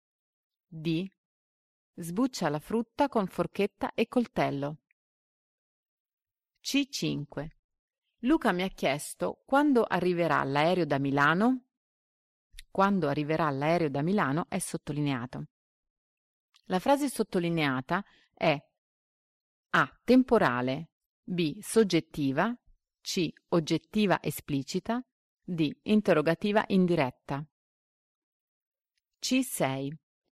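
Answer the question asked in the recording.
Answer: D: interrogativa indiretta.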